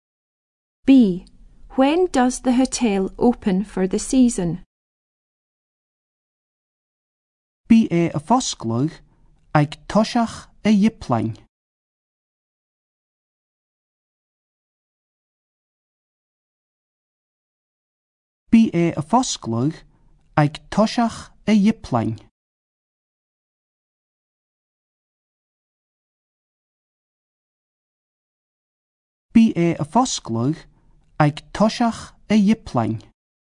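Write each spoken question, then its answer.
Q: B. When does the hotel open for the season?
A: At the beginning of April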